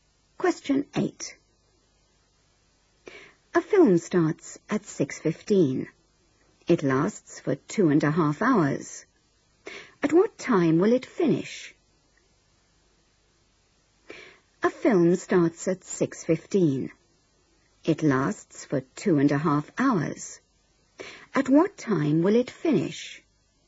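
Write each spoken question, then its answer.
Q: At what time will it finish?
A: 8:45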